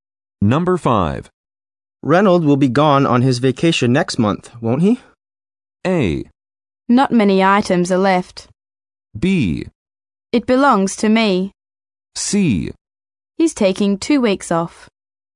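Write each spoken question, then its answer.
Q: Reynolds will be gone on his vacation next month, won't he?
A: C: He's taking 2 weeks off.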